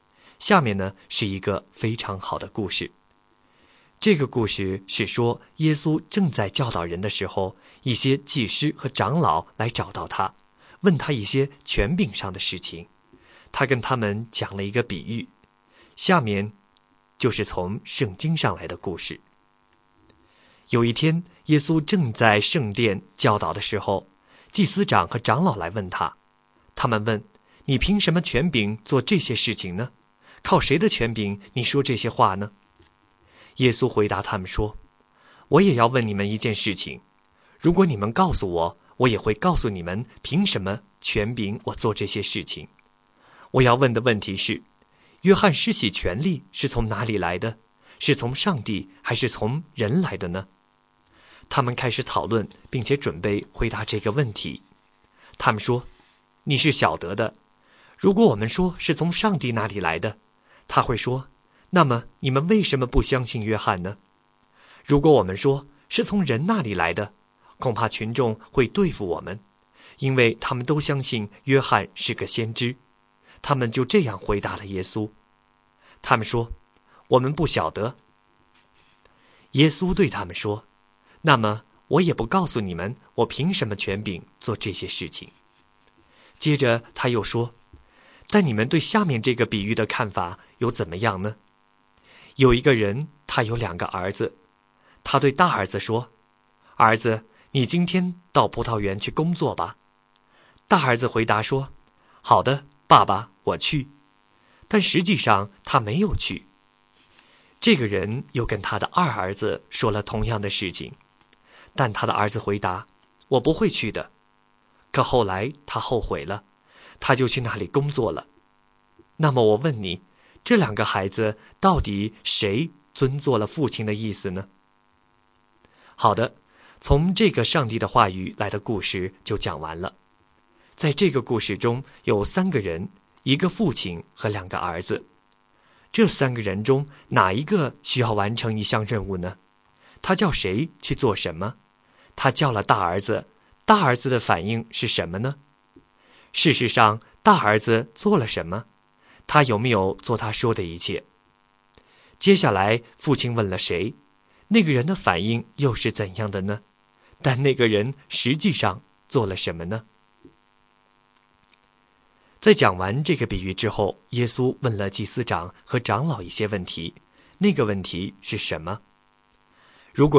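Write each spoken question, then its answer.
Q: 他叫了大儿子,大儿子的反应是什么呢?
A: 他说:好的,爸爸,我去

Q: 事实上,大儿子做了什么?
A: 他没有去

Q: 接下来父亲问了谁,那个人的反应又是怎样的呢?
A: 二儿子,他说我不会去的

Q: 但那个人实际上做了什么呢?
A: 他后来后悔了,就去葡萄园工作了

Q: 在讲完这个比喻之后,耶稣问了祭司长和长老一些问题,那个问题是什么?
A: 这两个孩子到底谁遵行了父亲的意思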